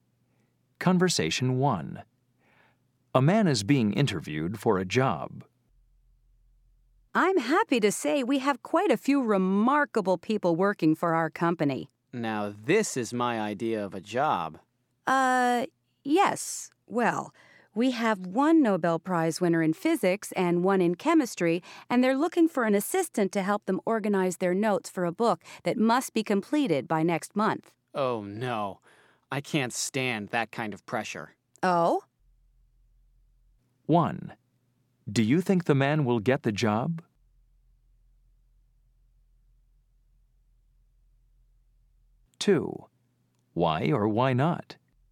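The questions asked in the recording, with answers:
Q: Do you think the man will get the job?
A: No

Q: Why or why not?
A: He says he can't stand that kind of pressure.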